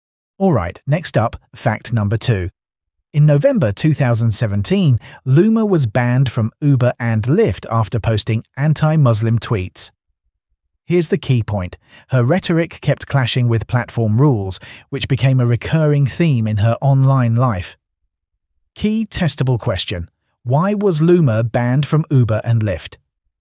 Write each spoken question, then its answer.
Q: Why was Loomer banned from Uber and Lyft?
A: Correct answer, anti-Muslim tweets.